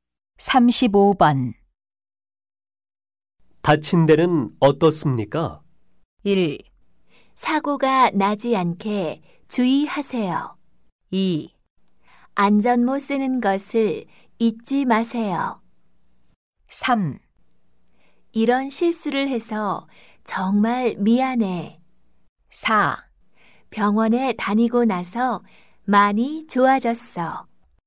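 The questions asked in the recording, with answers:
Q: 다친 데는 어떻습니까?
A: 4: 병원에 다니고 나서 많이 좋아졌어.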